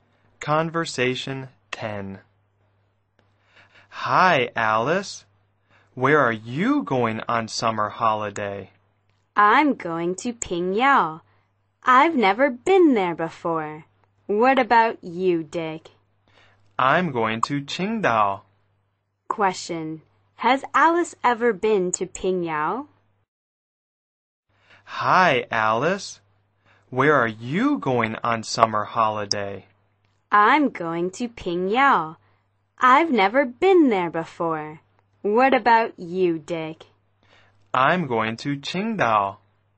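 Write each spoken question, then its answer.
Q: Has Alice ever been to Pingyao?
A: No, she hasn't.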